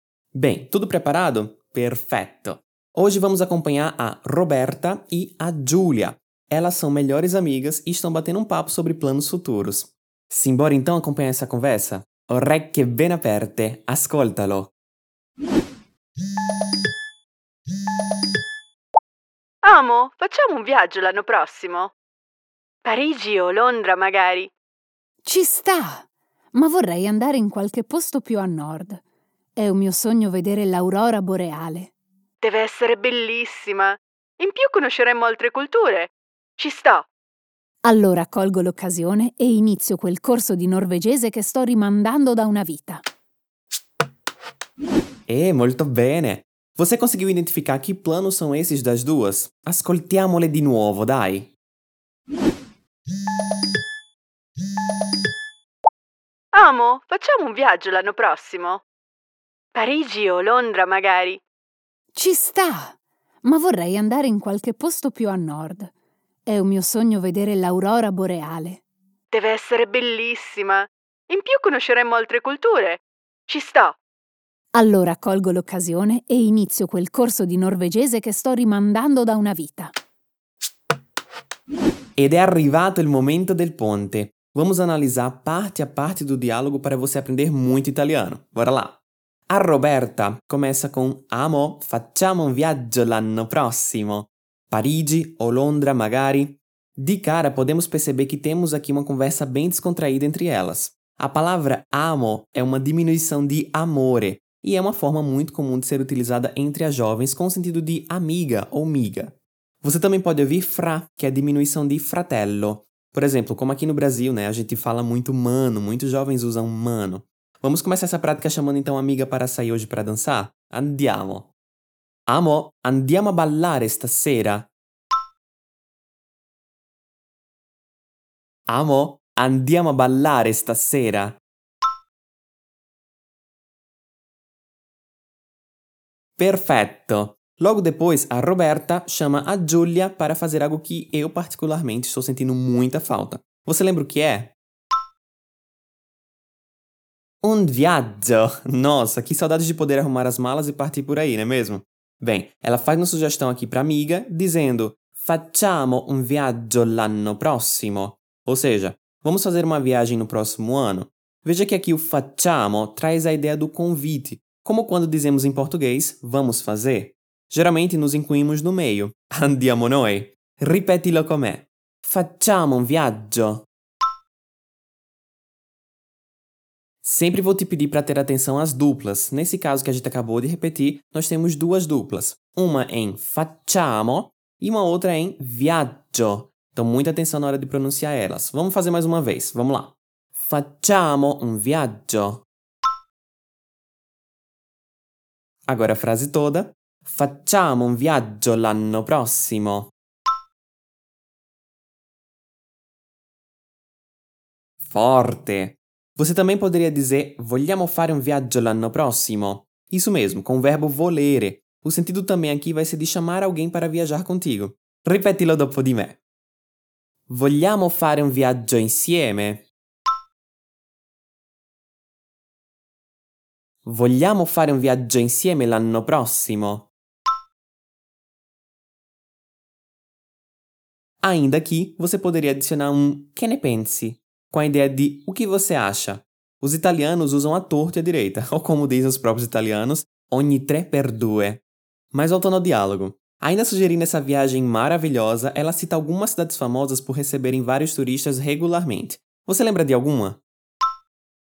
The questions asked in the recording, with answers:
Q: Logo depois, a Roberta chama a Giulia para fazer algo que eu particularmente estou sentindo muita falta. Você lembra o que é?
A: Un viaggio!

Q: Ainda sugerindo essa viagem maravilhosa, ela cita algumas cidades famosas por receberem vários turistas regularmente. Você lembra de alguma?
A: Ecco! Ela cita Parigi ou Londra.